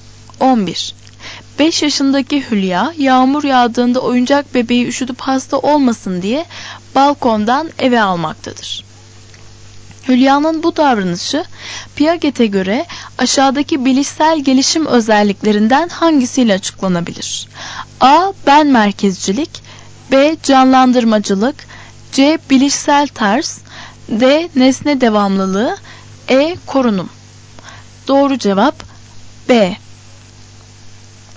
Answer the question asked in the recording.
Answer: Doğru cevap B.